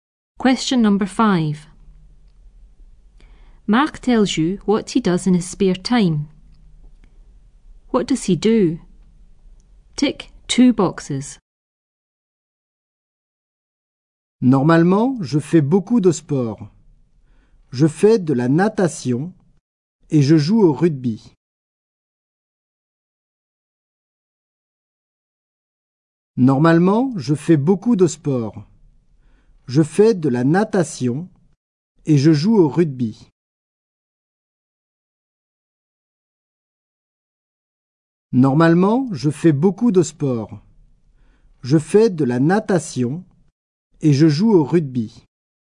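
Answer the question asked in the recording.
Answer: Swimming and rugby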